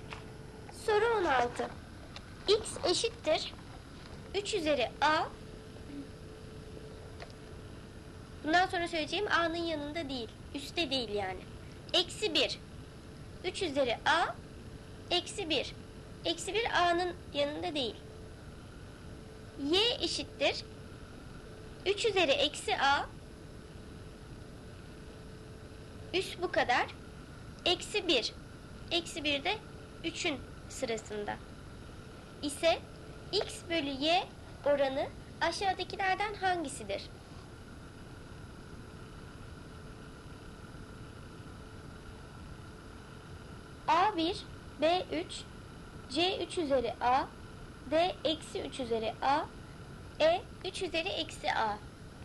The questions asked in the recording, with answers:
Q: İse x bölü y oranı aşağıdakilerden hangisidir?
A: Doğru cevap D eksi 3 üzeri A.